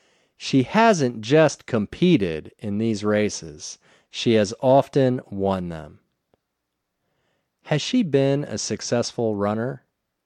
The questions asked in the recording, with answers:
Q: Has she been a successful runner?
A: Yes, she has been a successful runner.